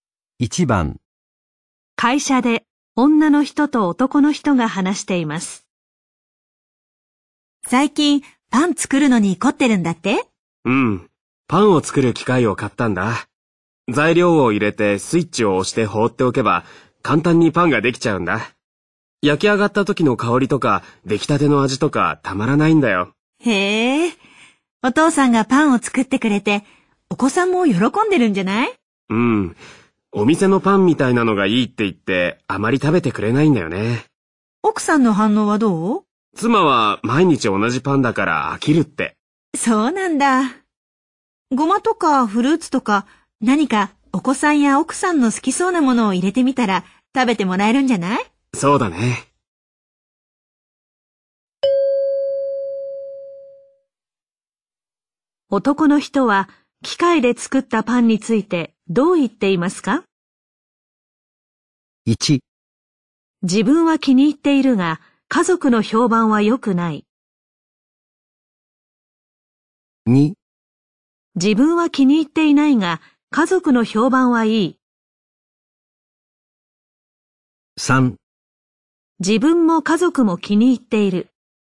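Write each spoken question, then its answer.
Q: 男の人は、機械で作ったパンについて、どう言っていますか?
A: 1: 自分は気に入っているが、家族の評判は良くない。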